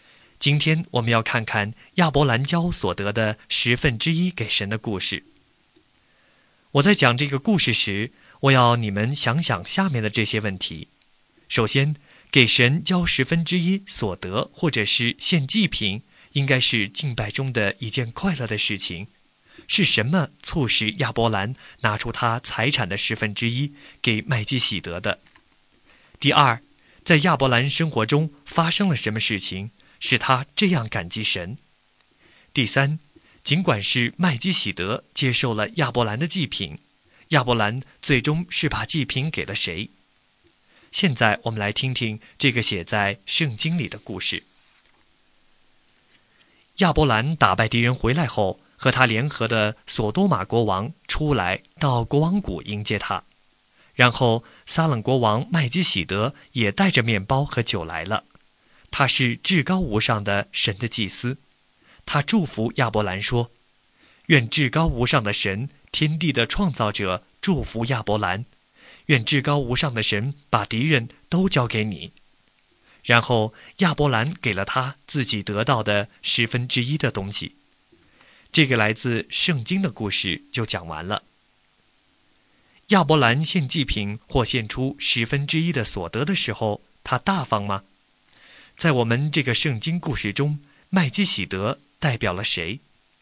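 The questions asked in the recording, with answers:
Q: 在亚伯兰生活中发生了什么事情使他这样感激神?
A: 他打败了敌人,神把敌人交给了他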